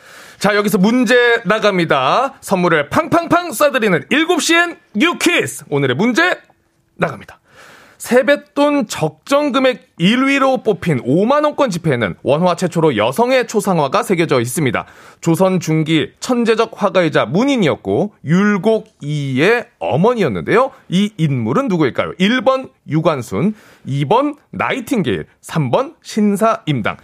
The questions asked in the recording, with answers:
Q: 이 인물은 누구일까요? 1번 유관순, 2번 나이팅게일, 3번 신사임당.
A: 5만원권 지폐에 그려진 주인공 정답은 3번 신사임당이죠.